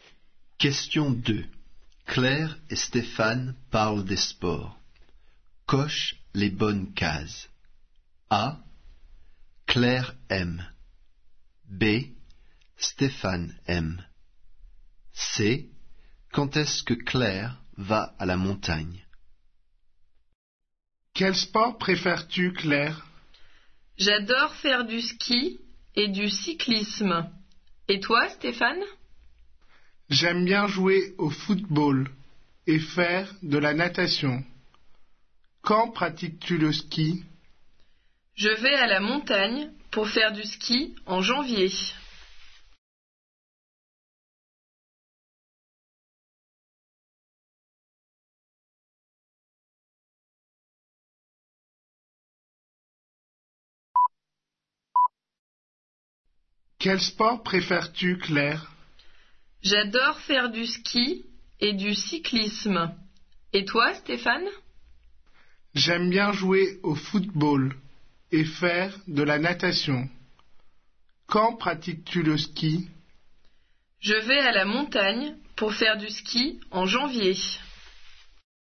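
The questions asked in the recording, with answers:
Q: Quand est-ce que Claire va à la montagne?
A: en janvier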